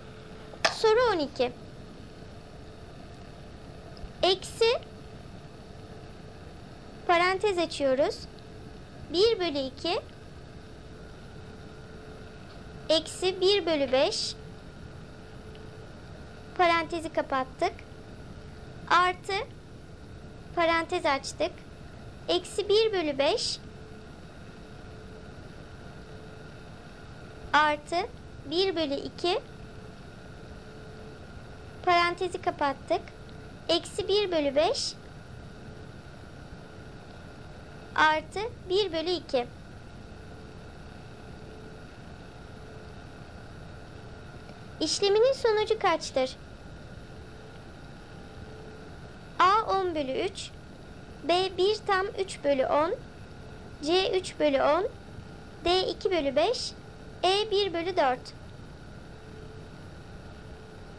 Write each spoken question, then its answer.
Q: İşleminin sonucu kaçtır?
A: Doğru cevap C 3 bölü 10.